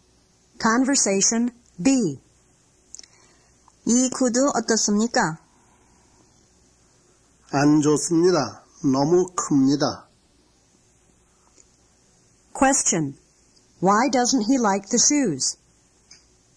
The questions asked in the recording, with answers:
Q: Why doesn't he like the shoes?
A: He doesn't like them because they are too big.